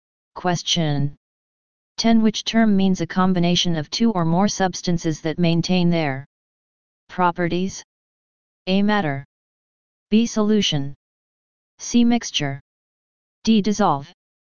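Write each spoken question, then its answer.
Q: Which term means a combination of two or more substances that maintain their properties?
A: C: Mixture.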